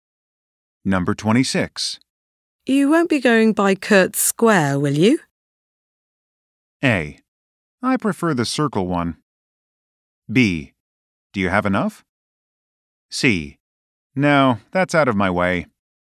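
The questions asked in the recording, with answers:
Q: You won't be going by Kurtz Square, will you?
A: C: No, that's out of my way.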